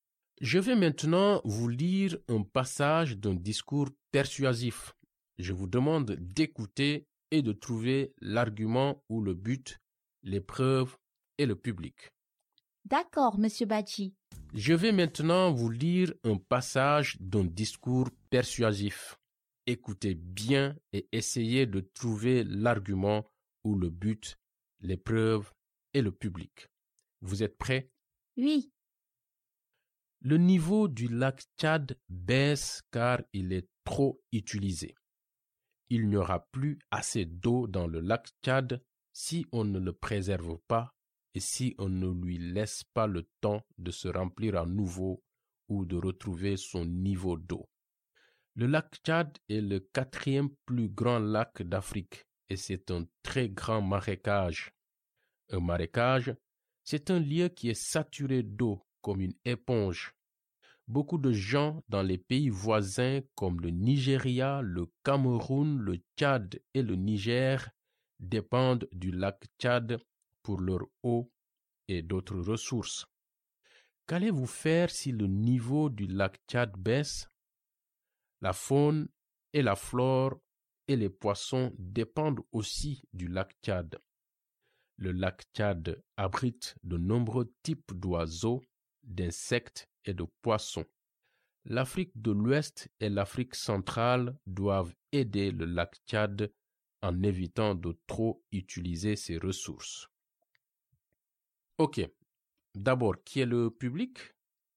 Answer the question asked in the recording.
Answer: Les habitants d'Afrique de l'Ouest et d'Afrique centrale?